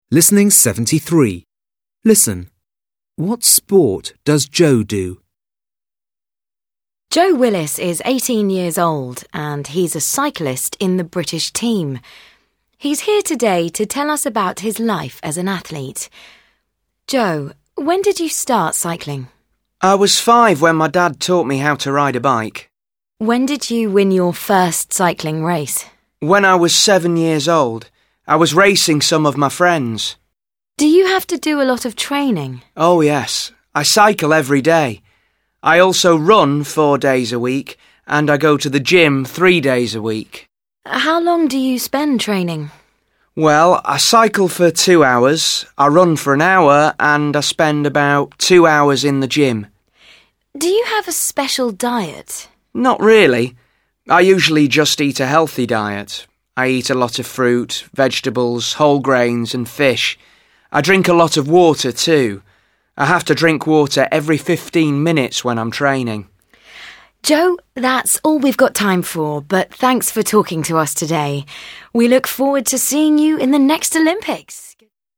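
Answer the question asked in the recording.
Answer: Cycling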